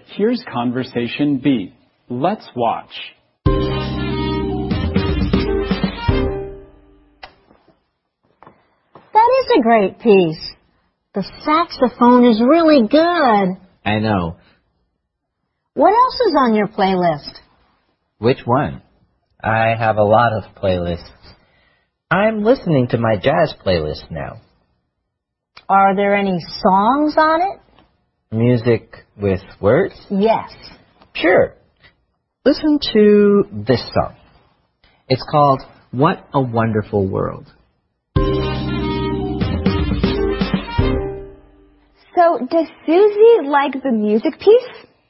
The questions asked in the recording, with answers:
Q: So, does Susie like the music piece?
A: Yes, she does. She thinks the saxophone is really good.